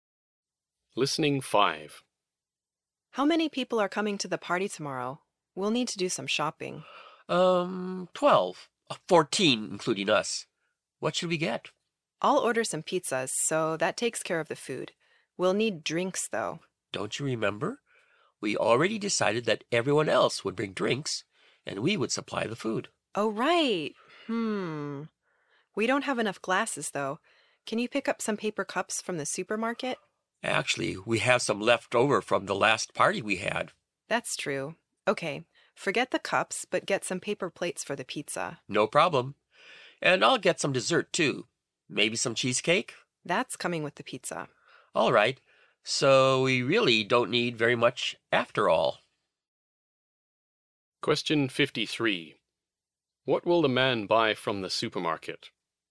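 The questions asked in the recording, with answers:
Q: What will the man buy from the supermarket?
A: Paper plates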